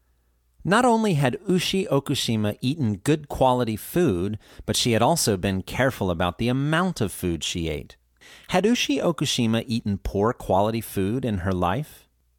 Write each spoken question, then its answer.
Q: Had Ushi Okushima eaten poor quality food in her life?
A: No, she hadn't. She had eaten good quality food.